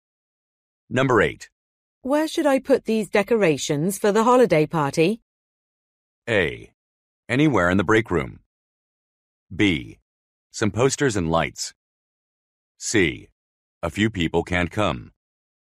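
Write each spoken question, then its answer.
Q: Where should I put these decorations for the holiday party?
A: A: Anywhere in the break room.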